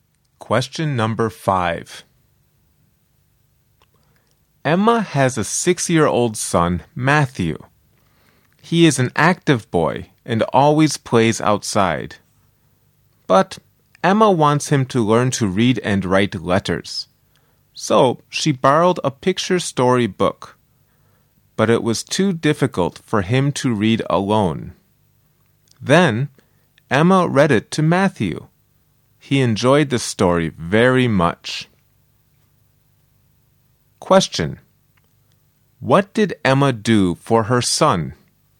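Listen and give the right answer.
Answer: She read a picture story book to him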